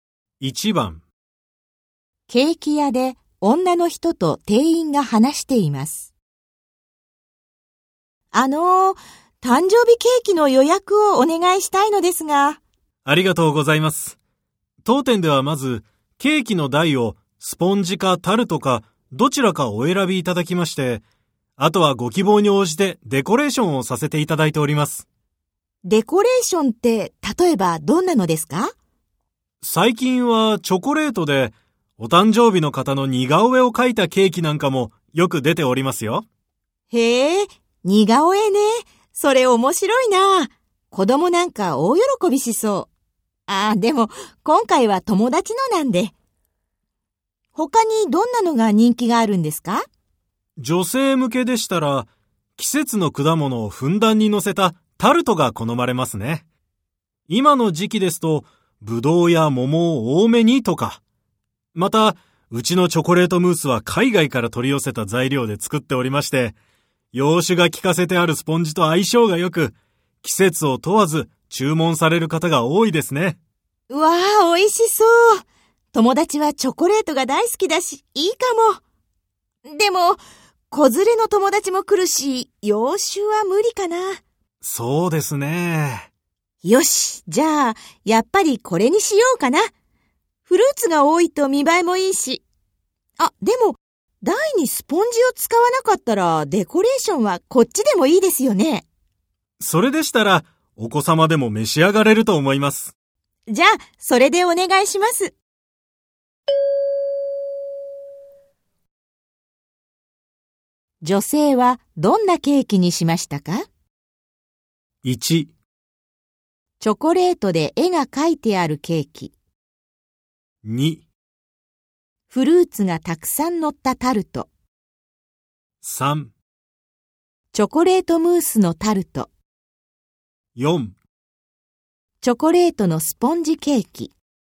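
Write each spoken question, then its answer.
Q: 女性はどんなケーキにしましたか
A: 3: チョコレートムースのタルト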